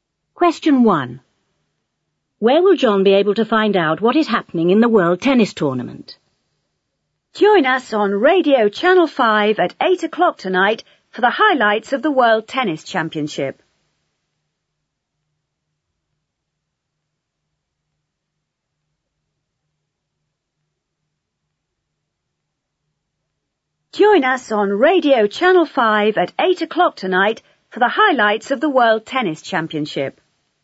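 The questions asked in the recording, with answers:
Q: Where will John be able to find out what is happening in the World Tennis Tournament?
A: On Radio Channel 5 (at 8 o'clock tonight)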